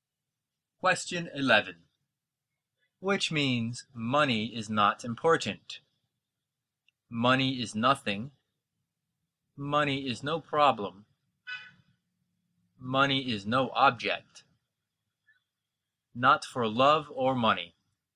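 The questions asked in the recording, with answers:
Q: Which means money is not important?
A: C: Money is no object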